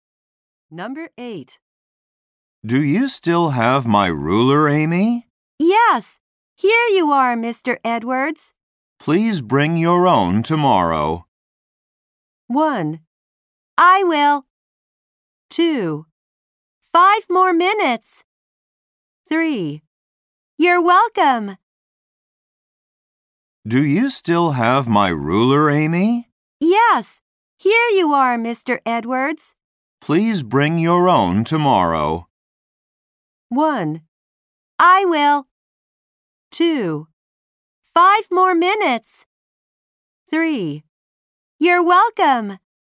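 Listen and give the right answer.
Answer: 1: I will.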